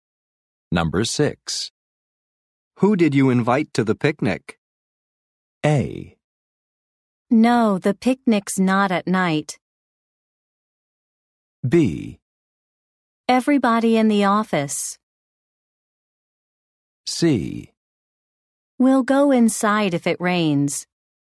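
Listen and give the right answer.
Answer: B: Everybody in the office.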